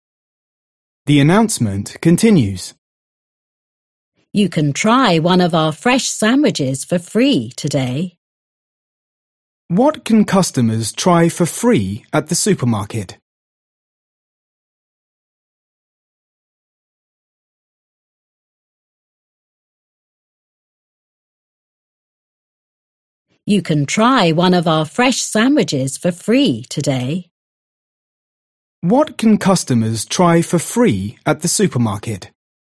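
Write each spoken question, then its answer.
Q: What can customers try for free at the supermarket?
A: a fresh sandwich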